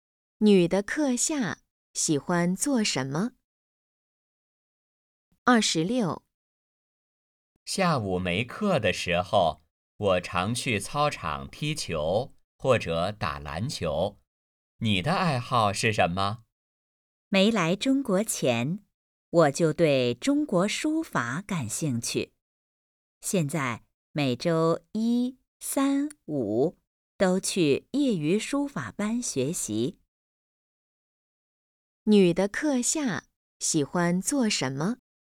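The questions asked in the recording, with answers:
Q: 女的课下喜欢做什么?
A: 学书法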